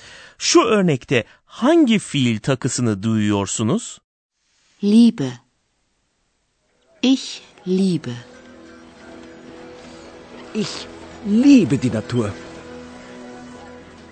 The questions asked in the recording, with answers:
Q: Şu örnekte hangi fiil takısını duyuyorsunuz?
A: ich yani ben kullanıldığında fiil takısının e olması gerekiyor.